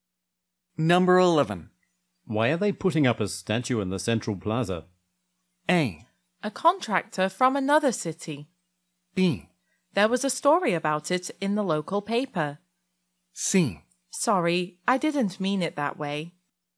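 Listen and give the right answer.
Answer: B: There was a story about it in the local paper.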